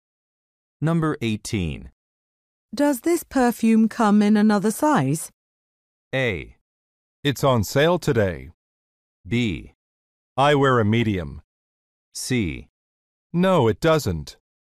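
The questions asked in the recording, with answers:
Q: Does this perfume come in another size?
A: C: No, it doesn't.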